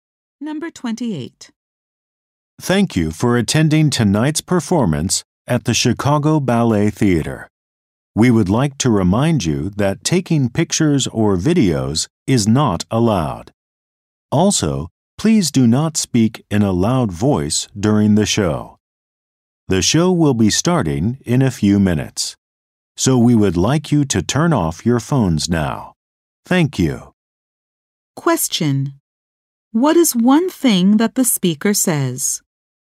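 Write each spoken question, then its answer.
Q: What is one thing that the speaker says?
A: Taking pictures or videos is not allowed.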